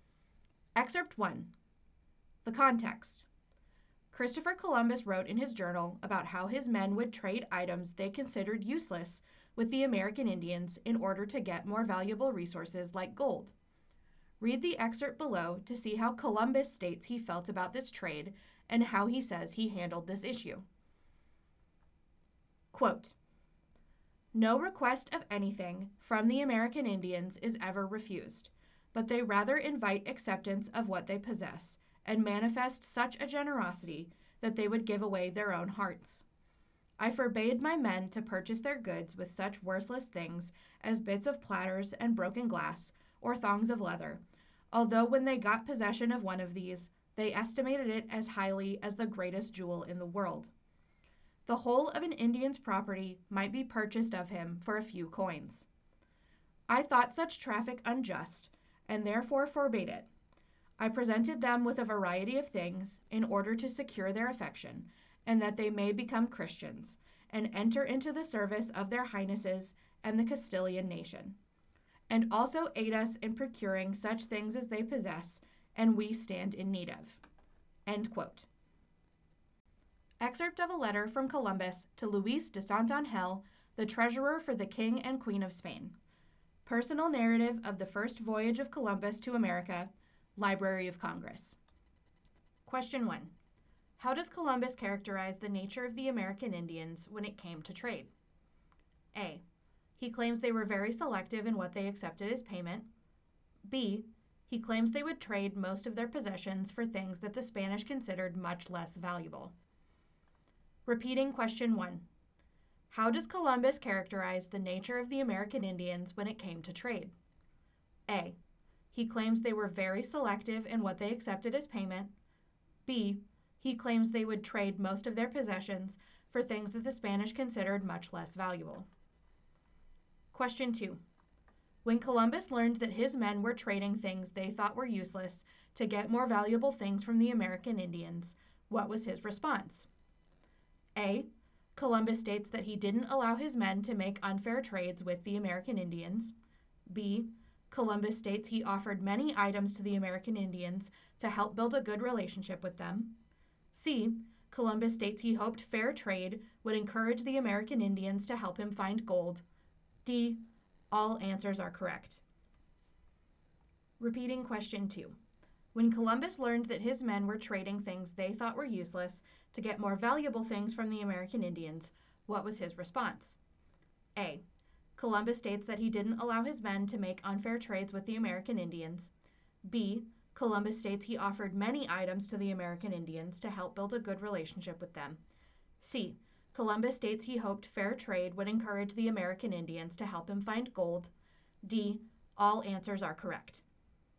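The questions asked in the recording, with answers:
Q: How does Columbus characterize the nature of the American Indians when it came to trade?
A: B: He claims they would trade most of their possessions for things that the Spanish considered much less valuable.

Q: When Columbus learned that his men were trading things they thought were useless to get more valuable things from the American Indians, what was his response?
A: D: All answers are correct.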